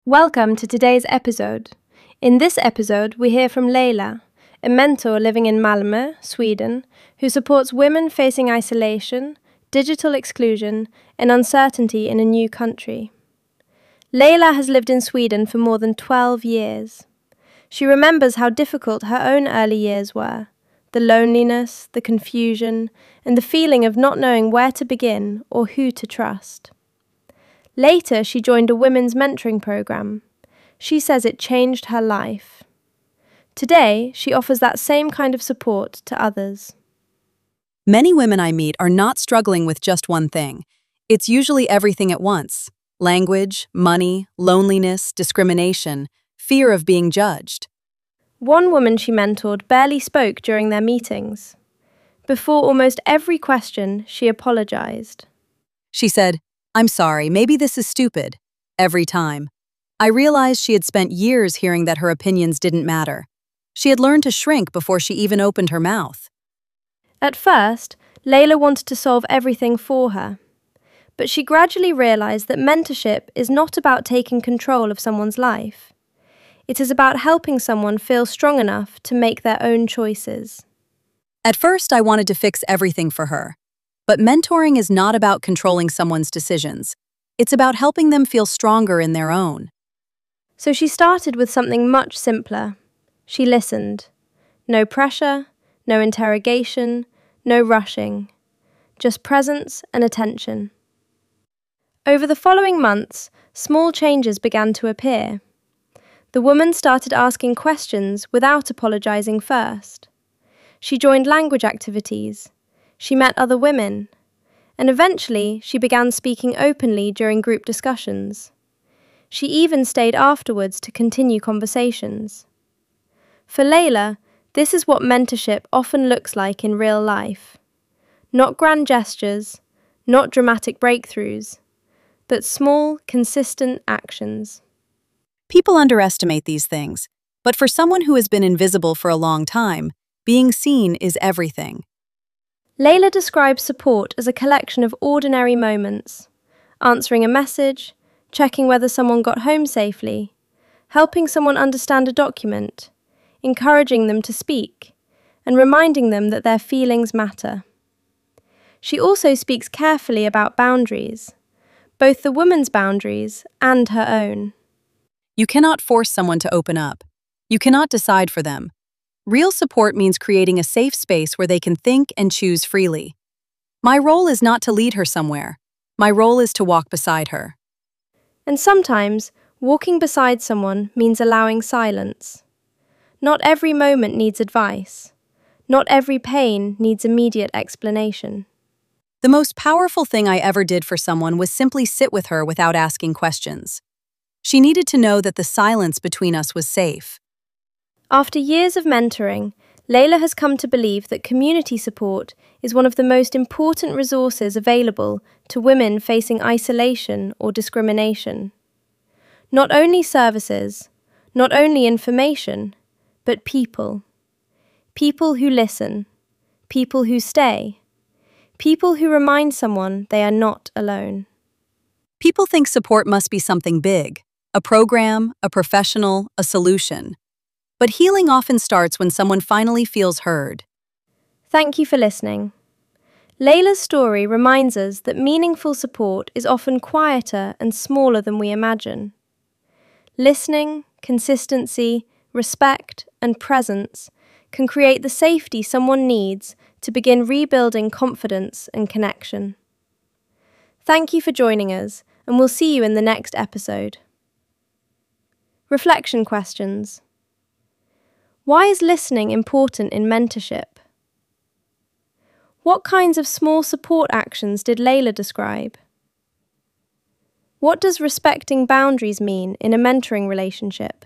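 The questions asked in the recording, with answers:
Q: What kinds of small support actions did Leila describe?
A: Answering a message, checking someone got home safely, helping understand a document, encouraging them to speak, reminding them their feelings matter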